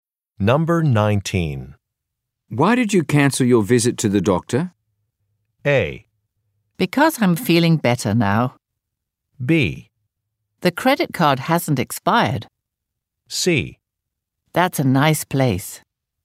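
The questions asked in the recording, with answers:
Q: Why did you cancel your visit to the doctor?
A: A: Because I'm feeling better now.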